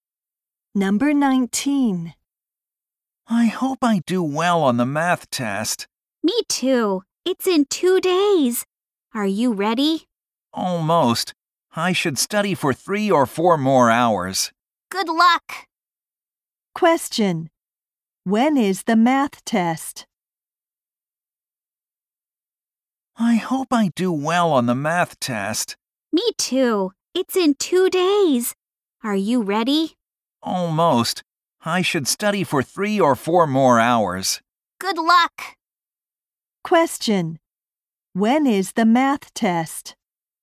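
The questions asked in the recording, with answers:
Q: When is the math test?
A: In two days.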